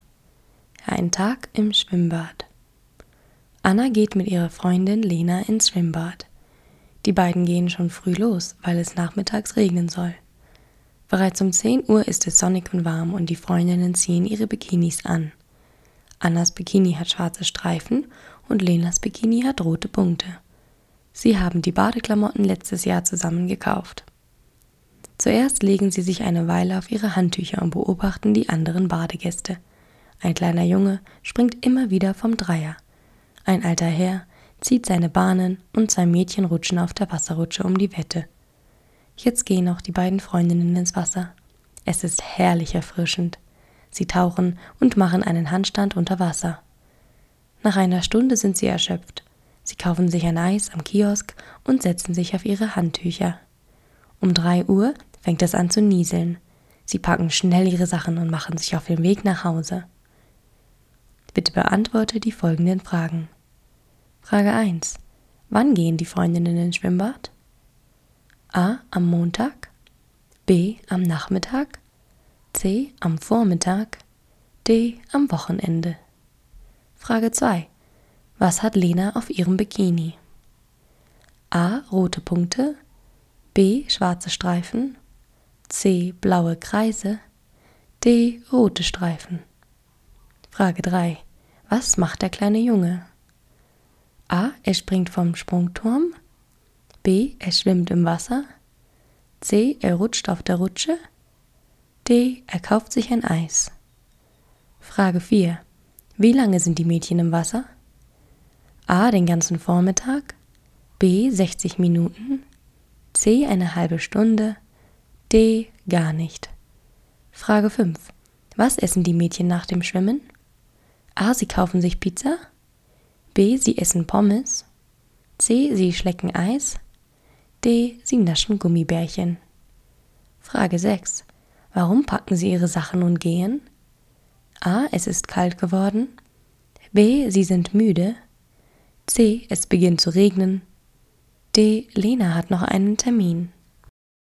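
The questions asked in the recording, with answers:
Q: Wann gehen die Freundinnen ins Schwimmbad?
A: C: Am Vormittag.

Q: Was hat Lena auf ihrem Bikini?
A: A: Rote Punkte.

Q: Was macht der kleine Junge?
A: A: Er springt vom Sprungturm.

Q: Wie lange sind die Mädchen im Wasser?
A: B: 60 Minuten.

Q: Was essen die Mädchen nach dem Schwimmen?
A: C: Sie schlecken Eis.

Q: Warum packen Sie Ihre Sachen und gehen?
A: C: Es beginnt zu regnen.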